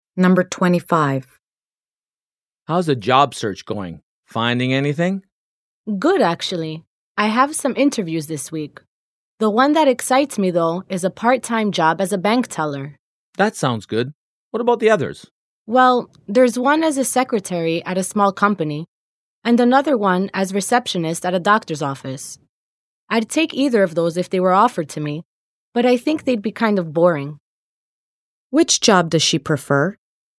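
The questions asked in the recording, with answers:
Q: Which job does she prefer?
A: The part-time job as a bank teller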